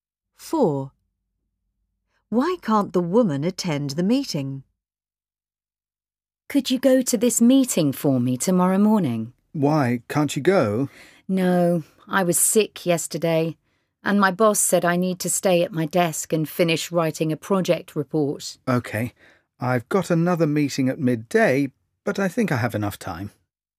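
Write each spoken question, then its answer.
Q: Why can't the woman attend the meeting?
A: She must stay at her desk and finish a project report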